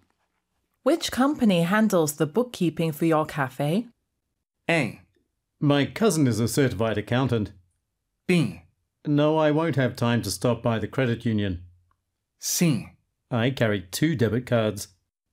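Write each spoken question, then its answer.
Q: Which company handles the bookkeeping for your cafe?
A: A: My cousin is a certified accountant.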